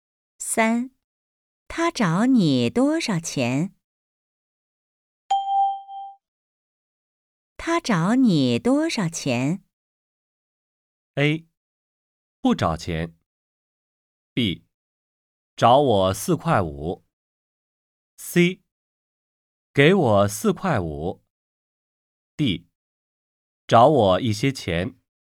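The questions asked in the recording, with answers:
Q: 他找你多少钱?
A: B: 找我四块五。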